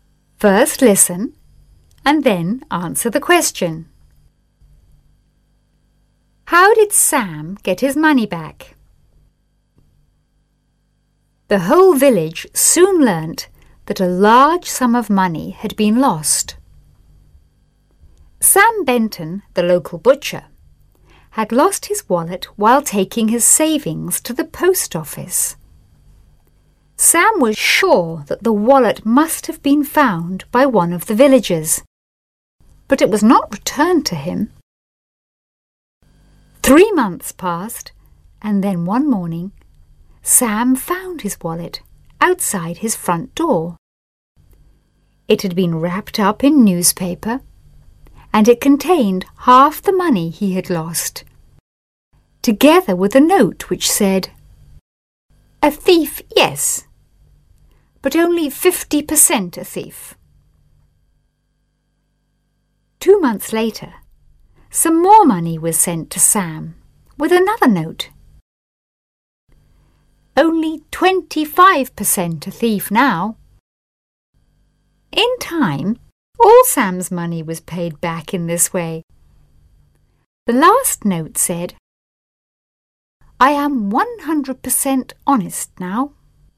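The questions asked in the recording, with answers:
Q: How did Sam get his money back?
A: The thief returned it in instalments, left with notes (half first, then more later, until all was paid back).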